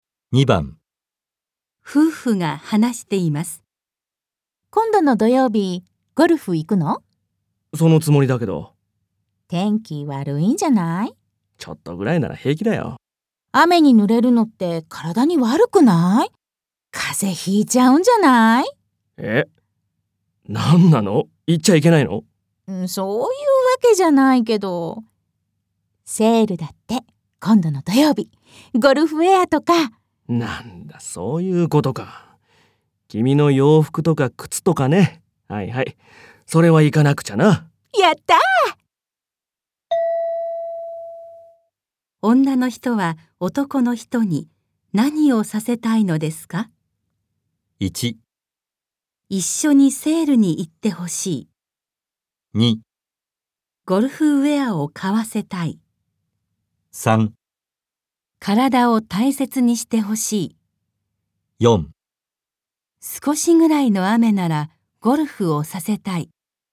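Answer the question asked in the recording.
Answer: 1: 一緒にセールに行ってほしい。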